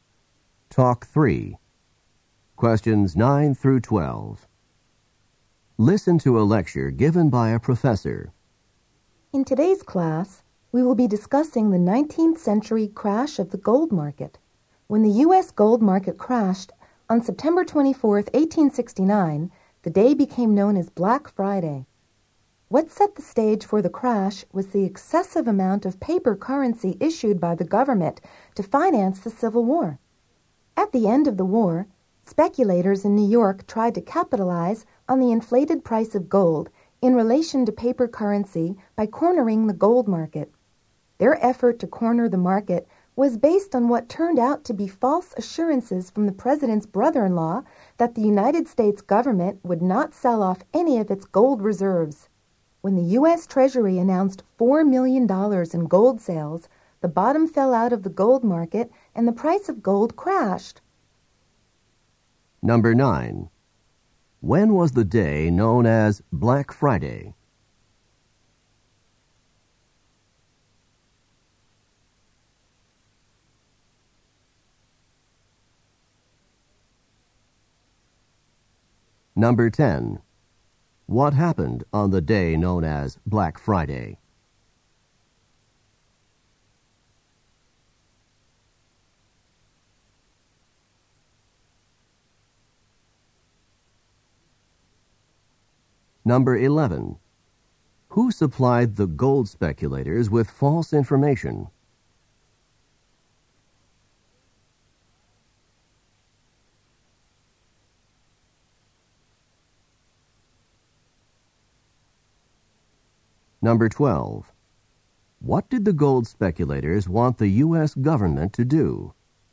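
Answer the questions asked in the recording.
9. September 24, 1869
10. The U.S. gold market crashed
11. The president's brother-in-law
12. Not sell any of its gold reserves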